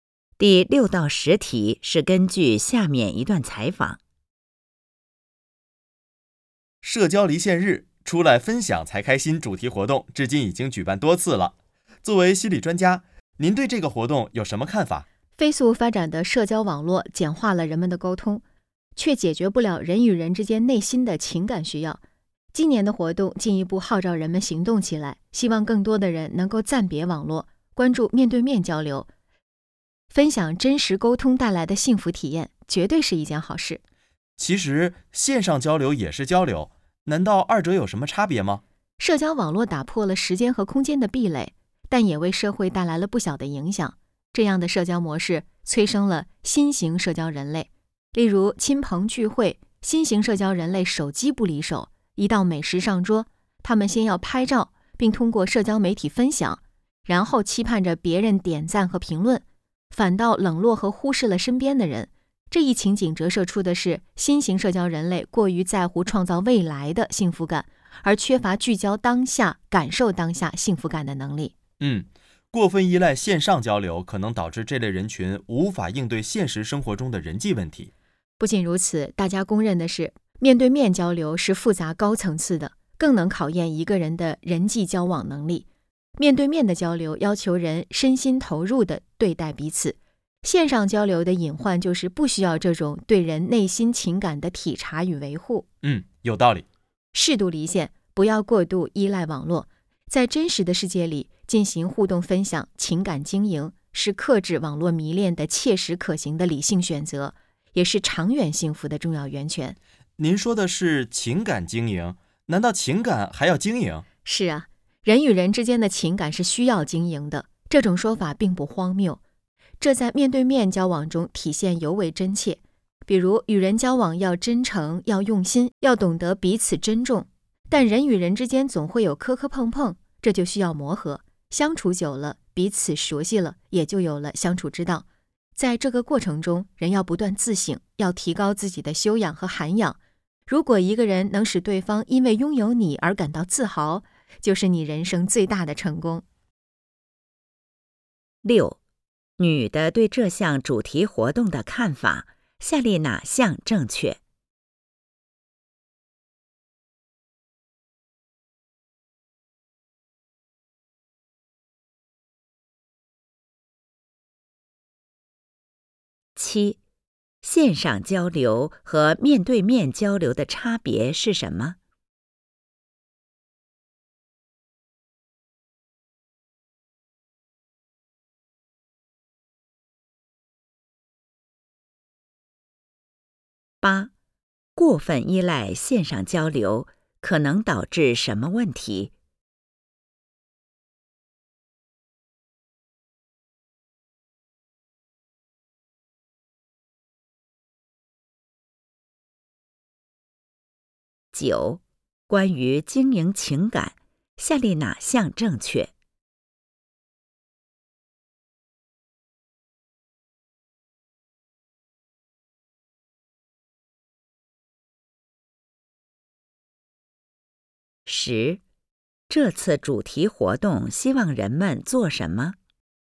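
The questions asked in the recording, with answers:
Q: 线上交流和面对面交流的差别是什么?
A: 面对面交流要求身心投入,体察和维护对方内心情感,线上交流不需要

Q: 过分依赖线上交流可能导致什么问题?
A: 无法应对现实生活中的人际问题

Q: 这次主题活动希望人们做什么?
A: 暂别网络,面对面交流,分享真实沟通带来的幸福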